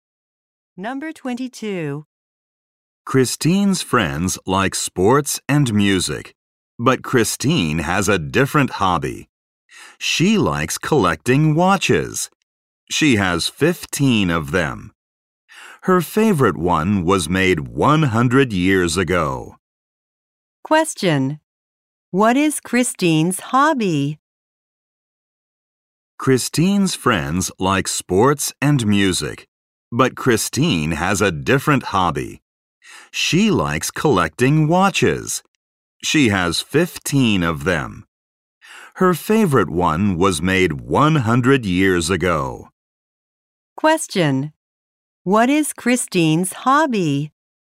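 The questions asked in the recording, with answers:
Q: Question: What is Christine's hobby?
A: Collecting watches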